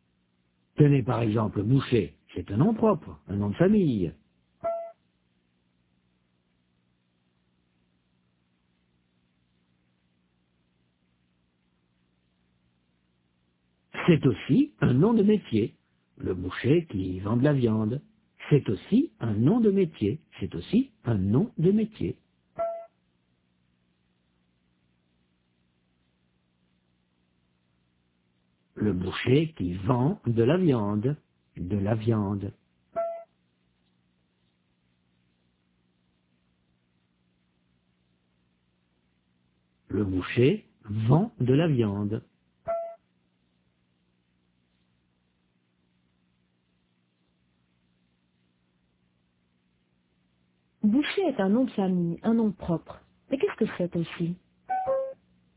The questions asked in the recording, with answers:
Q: Mais qu'est-ce que c'est aussi?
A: Un nom de métier.